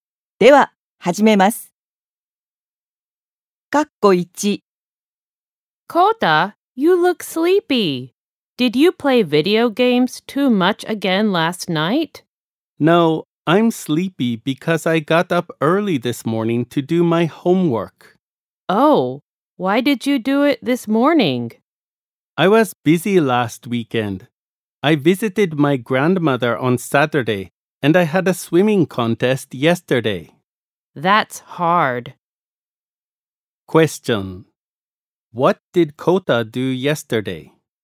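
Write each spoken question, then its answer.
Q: What did Kota do yesterday?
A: He had a swimming contest.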